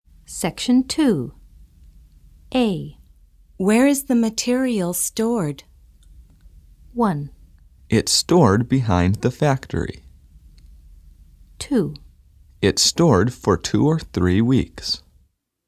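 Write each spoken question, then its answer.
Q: Where is the material stored?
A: 1: It's stored behind the factory.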